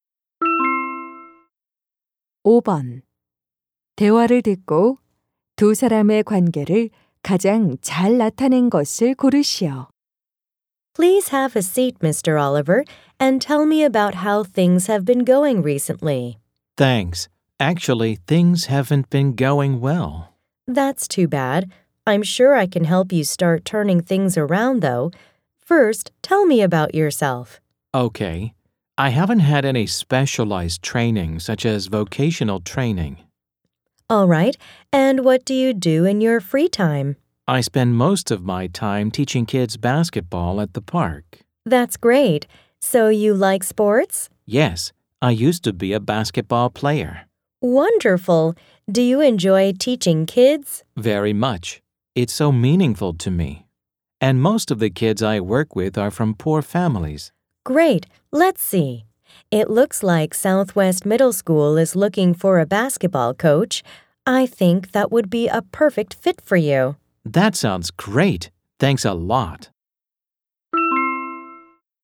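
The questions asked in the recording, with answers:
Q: 대화를 듣고 두 사람의 관계를 가장 잘 나타낸 것을 고르시오.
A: 직업 상담사 - 구직자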